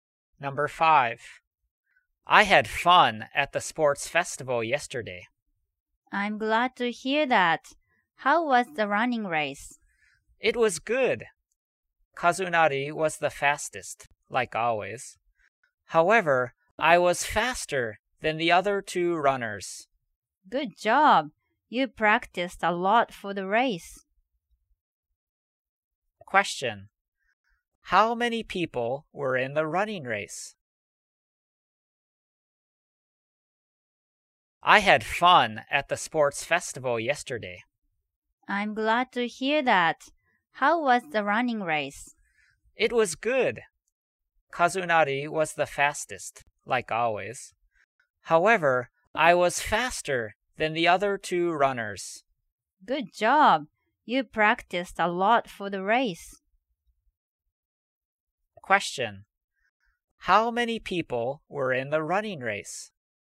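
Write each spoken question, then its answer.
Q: How many people were in the running race?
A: Four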